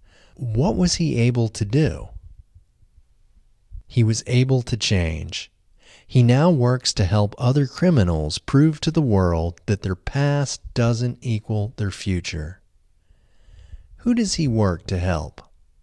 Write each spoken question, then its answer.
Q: Who does he work to help?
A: He works to help other criminals.